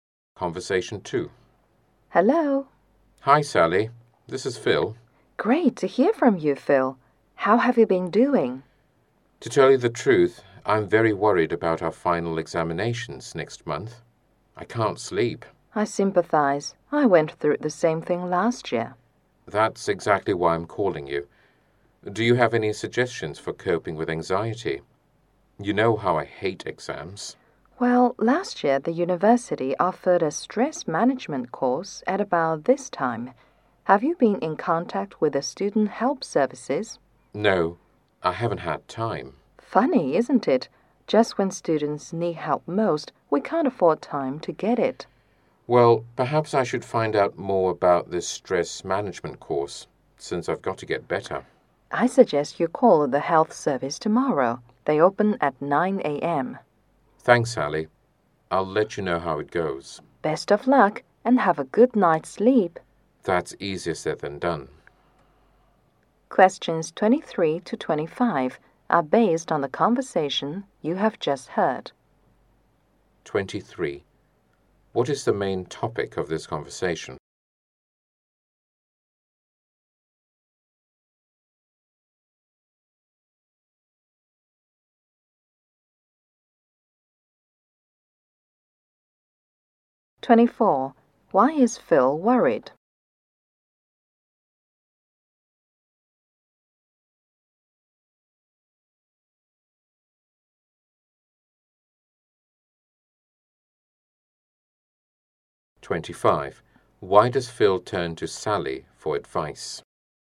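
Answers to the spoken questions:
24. Because of the final examinations next month
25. She went through the same thing last year.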